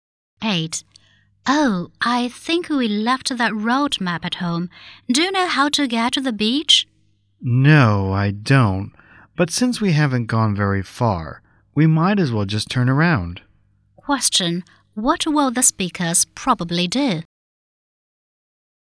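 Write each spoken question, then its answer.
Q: What will the speakers probably do?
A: Go back home to get the map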